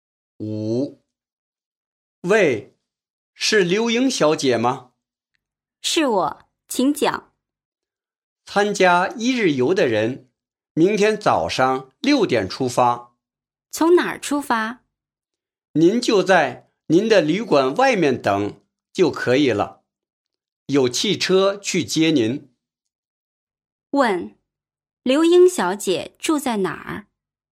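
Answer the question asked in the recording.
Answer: 旅馆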